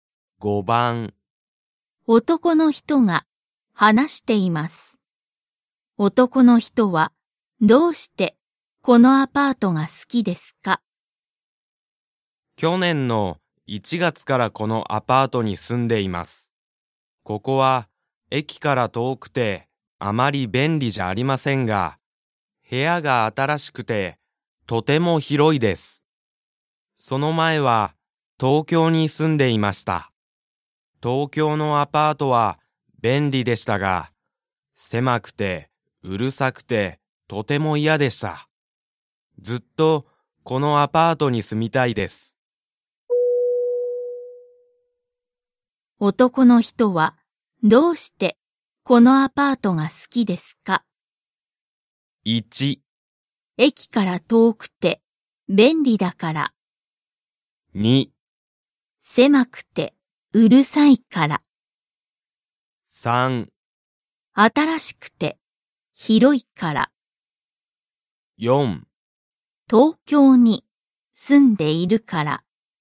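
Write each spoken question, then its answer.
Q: 男の人はどうしてこのアパートが好きですか?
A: 3: 新しくて広いから。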